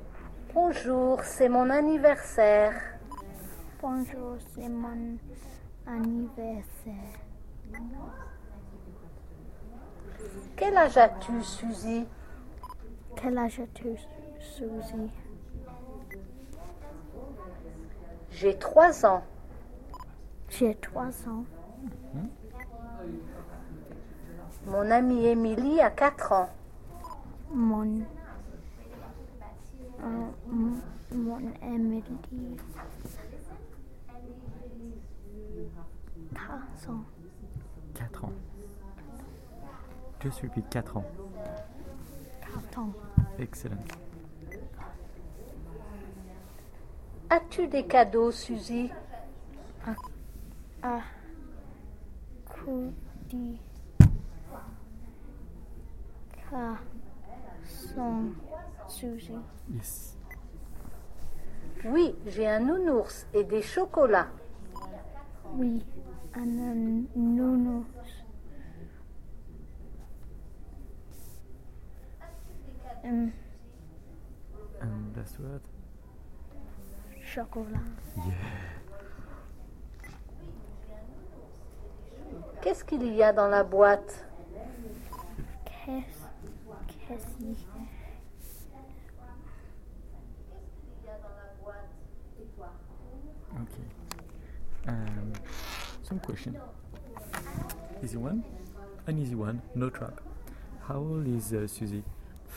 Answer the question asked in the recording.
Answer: Trois.